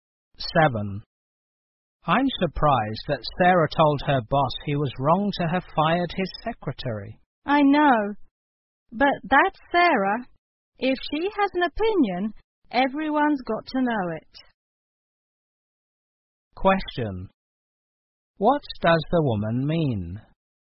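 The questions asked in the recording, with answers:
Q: What does the woman mean?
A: Sarah always speaks her mind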